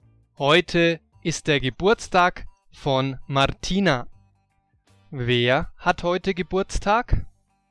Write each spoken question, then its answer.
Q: Wer hat heute Geburtstag?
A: Martina, sie hat heute Geburtstag.